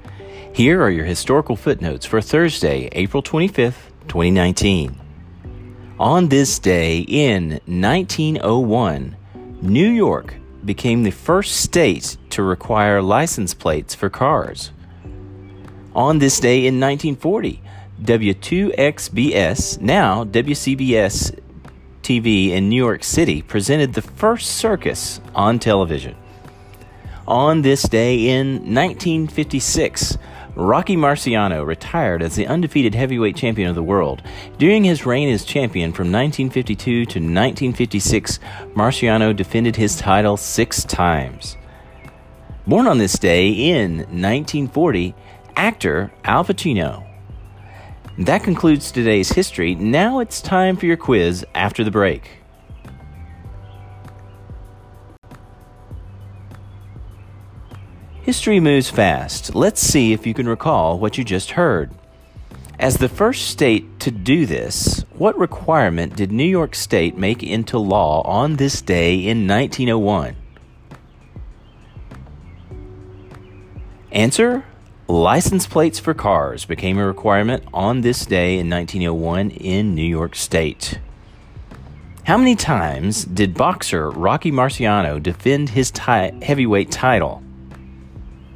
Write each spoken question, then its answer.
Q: How many times did boxer Rocky Marciano defend his heavyweight title?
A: Answer, six times.